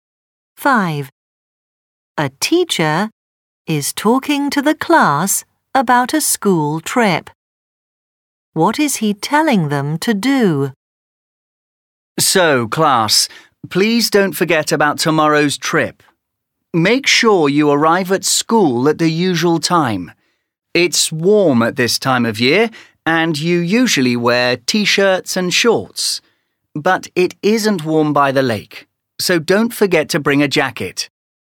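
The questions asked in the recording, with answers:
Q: What is he telling them to do?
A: Bring a jacket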